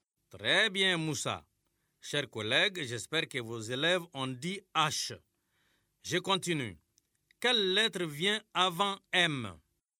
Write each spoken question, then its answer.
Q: Quelle lettre vient avant M?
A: Monsieur, c'est L.